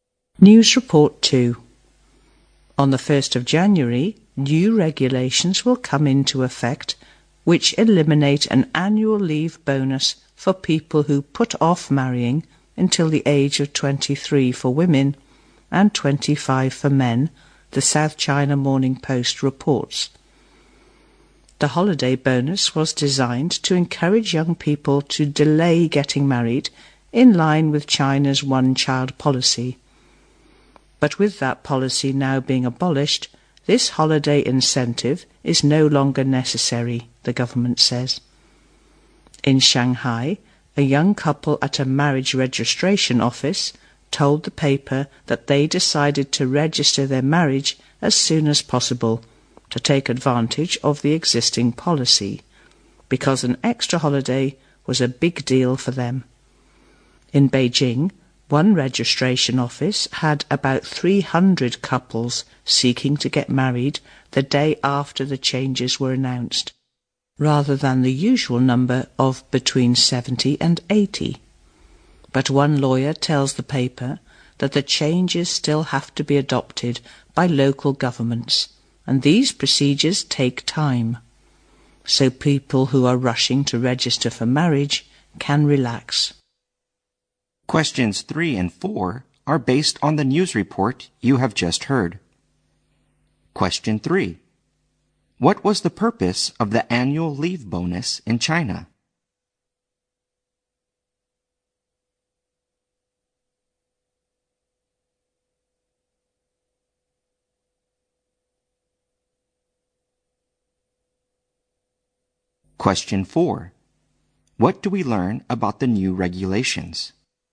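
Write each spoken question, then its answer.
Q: What was the purpose of the annual leave bonus in China?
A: To encourage young people to delay getting married.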